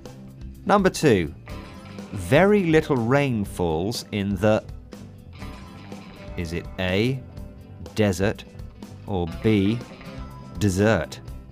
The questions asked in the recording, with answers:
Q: Number two. Very little rain falls in the... Is it A, desert, or B, dessert?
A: And the answer is A, desert.